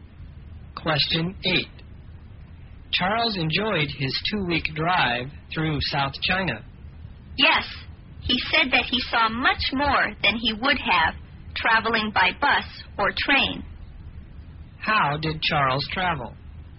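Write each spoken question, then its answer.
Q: How did Charles travel?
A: By car (he drove).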